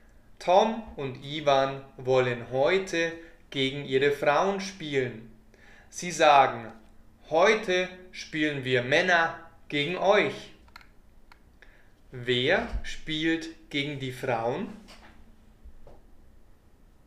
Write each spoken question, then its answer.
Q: Wer spielt gegen die Frauen?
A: Tom und Ivan. Sie spielen gegen ihre Frauen.